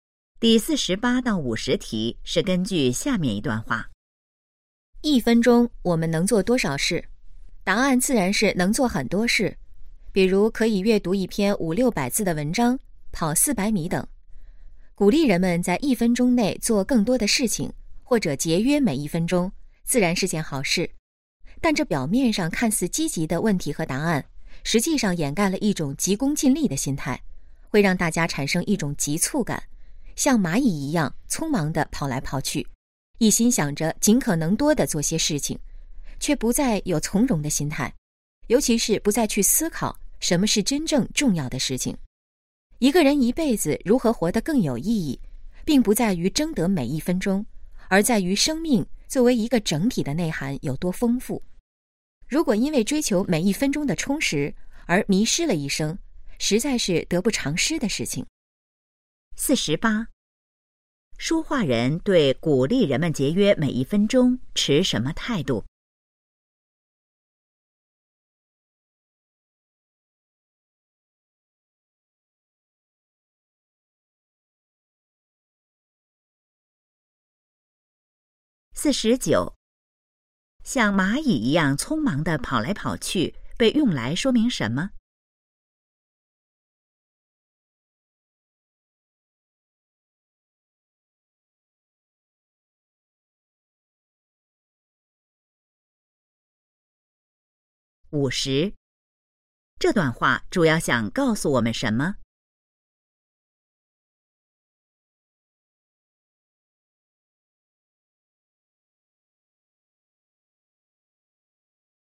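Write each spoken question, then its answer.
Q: 像蚂蚁一样匆忙地跑来跑去,被用来说明什么?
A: 人们急功近利,缺少从容的心态

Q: 这段话主要想告诉我们什么?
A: 人生的意义不在于争得每一分钟,而在于生命整体内涵的丰富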